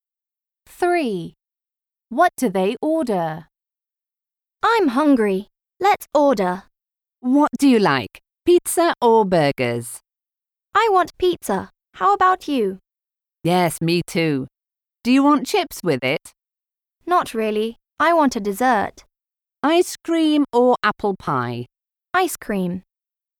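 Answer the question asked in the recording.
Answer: pizza and ice cream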